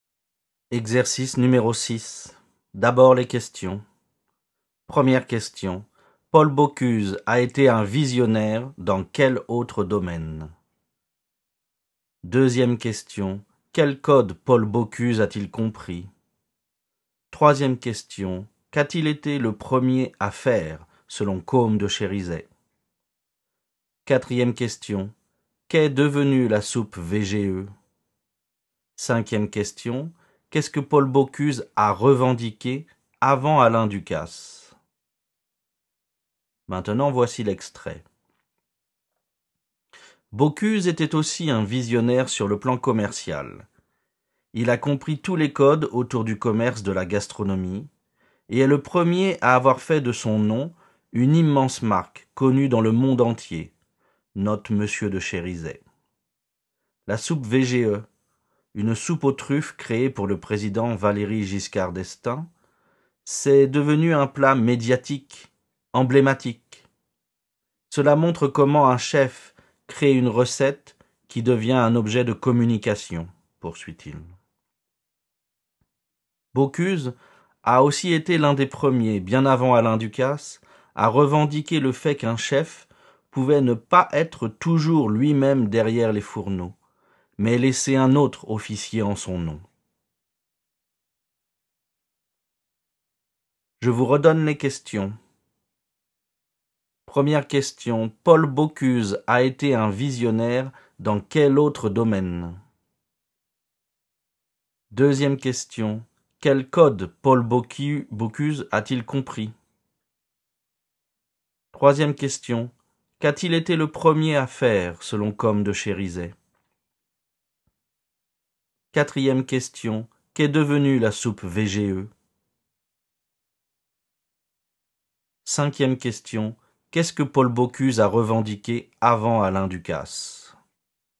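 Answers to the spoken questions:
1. Sur le plan commercial
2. Tous les codes autour du commerce de la gastronomie
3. Faire de son nom une immense marque connue dans le monde entier
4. Un plat médiatique, emblématique
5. Qu'un chef pouvait ne pas être toujours lui-même derrière les fourneaux et laisser un autre officier en son nom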